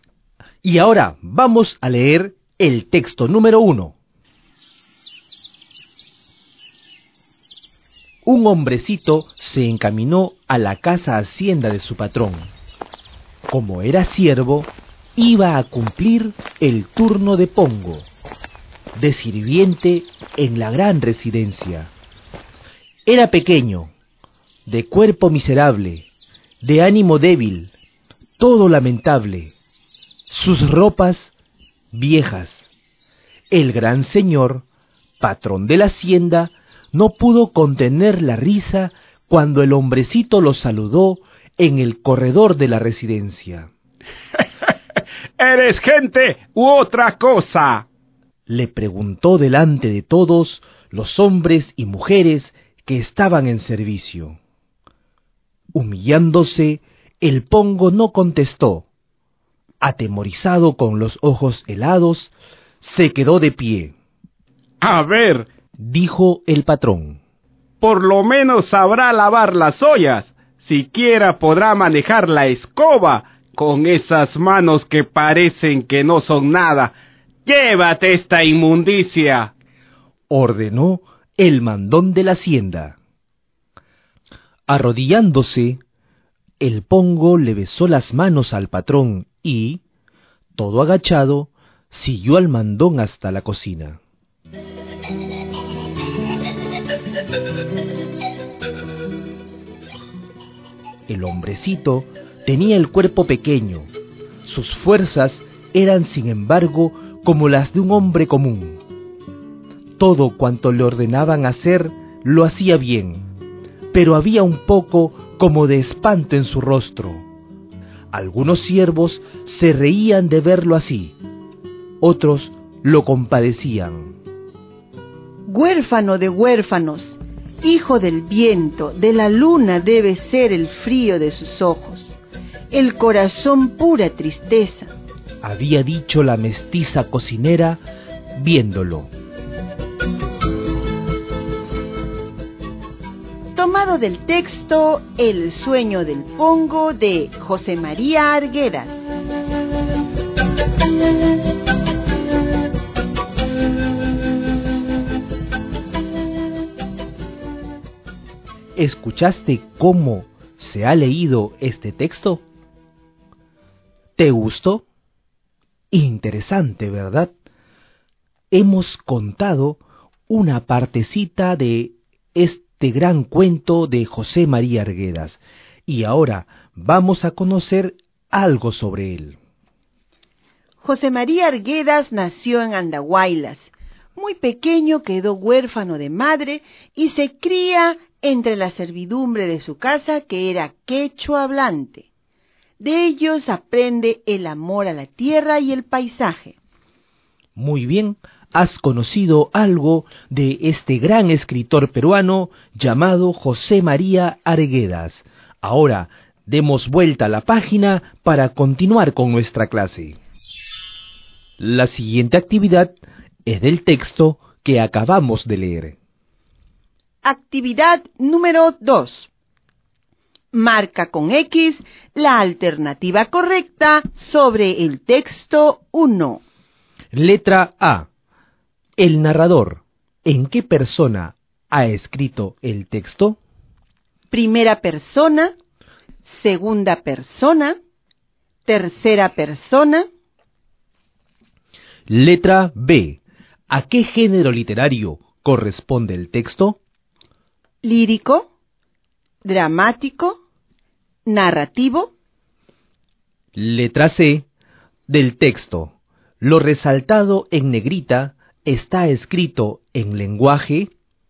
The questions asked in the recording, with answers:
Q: El narrador, ¿en qué persona ha escrito el texto?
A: En el texto número 1, nos estamos dando cuenta que el narrador ha escrito el texto en la tercera persona.

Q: ¿A qué género literario corresponde el texto?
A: en ambos casos el género literario es el género narrativo.